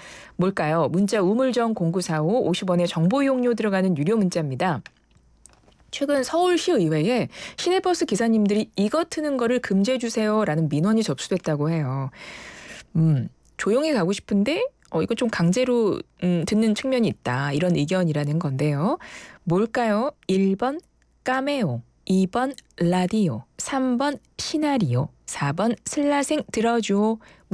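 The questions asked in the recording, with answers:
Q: 뭘까요? 1번 까메오, 2번 라디오, 3번 시나리오, 4번 슬라생 들어줘.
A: 2: 라디오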